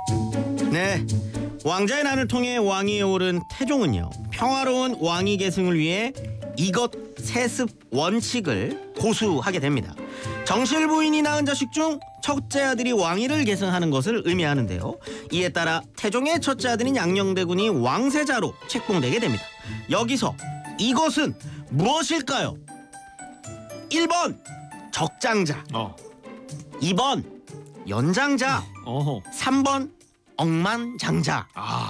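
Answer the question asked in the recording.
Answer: 1: 적장자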